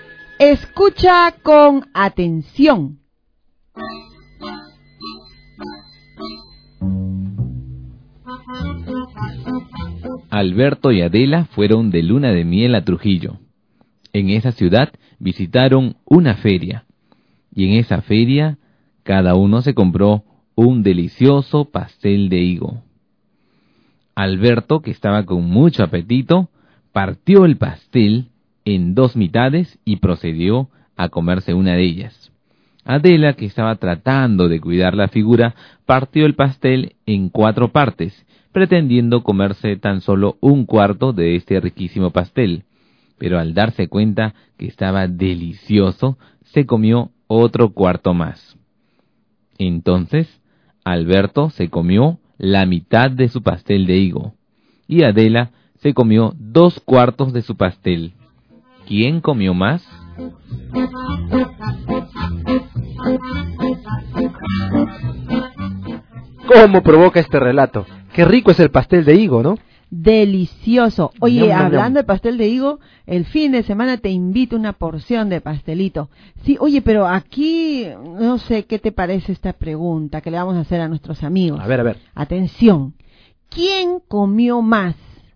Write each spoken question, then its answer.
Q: ¿Quién comió más?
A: La respuesta correcta es que ambos, o sea, Alberto y Adela, comieron lo mismo.